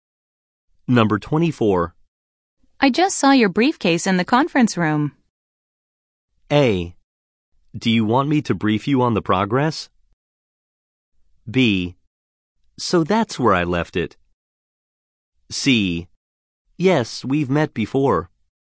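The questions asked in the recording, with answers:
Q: I just saw your briefcase in the conference room.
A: B: So that's where I left it.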